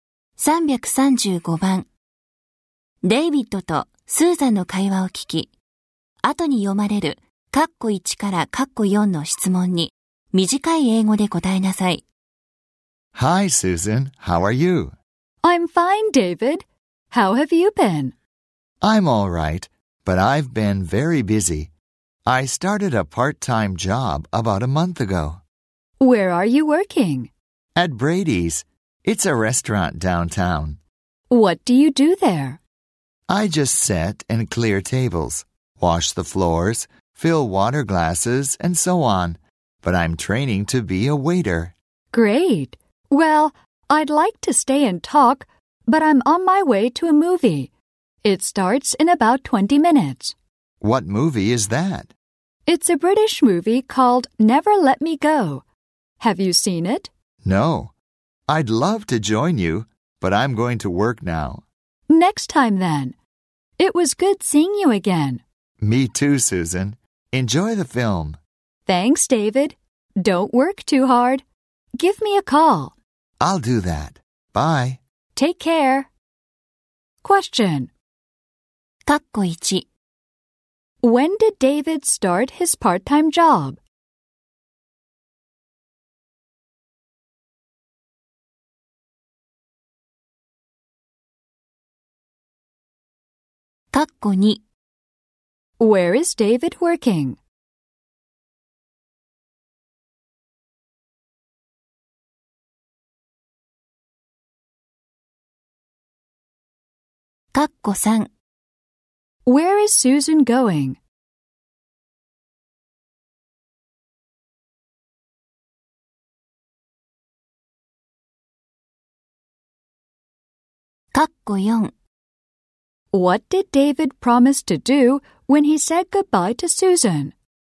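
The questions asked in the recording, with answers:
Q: When did David start his part-time job?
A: About a month ago.

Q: Where is David working?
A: At Brady's, a restaurant downtown.

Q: Where is Susan going?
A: To a movie.

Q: What did David promise to do when he said goodbye to Susan?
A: To give her a call.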